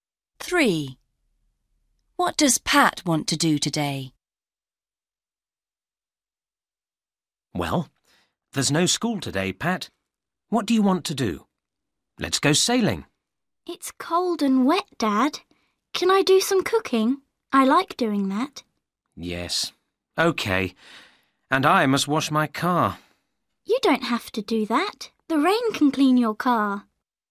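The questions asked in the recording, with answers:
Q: What does Pat want to do today?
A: Do some cooking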